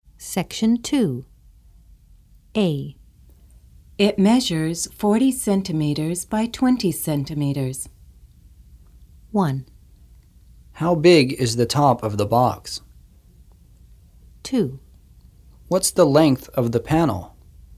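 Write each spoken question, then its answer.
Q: How big is the top of the box?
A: 1: How big is the top of the box?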